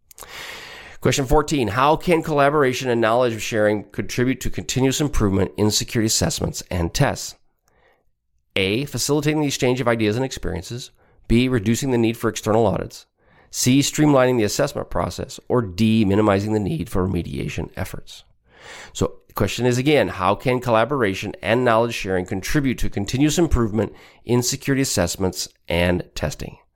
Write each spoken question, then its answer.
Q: How can collaboration and knowledge sharing contribute to continuous improvement in security assessments and tests?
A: Answer is A, facilitating the exchange of ideas and experiences.